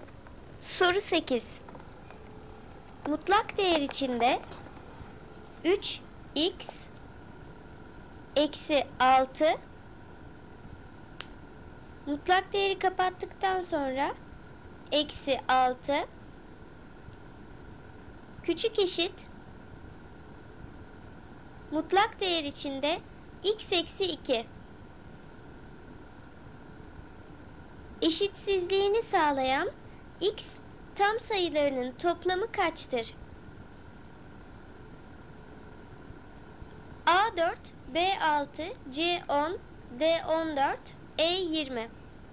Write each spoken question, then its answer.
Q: Eşitsizliğini sağlayan x tam sayılarının toplamı kaçtır?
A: Doğru cevap D 14.